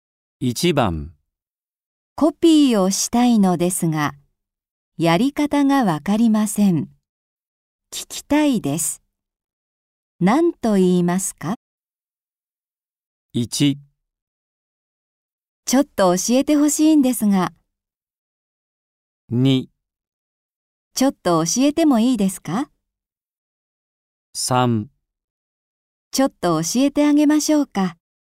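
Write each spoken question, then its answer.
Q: 何と言いますか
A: 1: ちょっと教えてほしいんですが。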